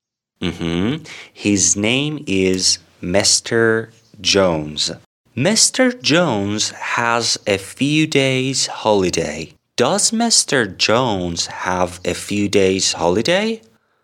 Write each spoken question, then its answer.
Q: Does Mr. Jones have a few days holiday?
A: Yes, Mr. Jones has a few days holiday.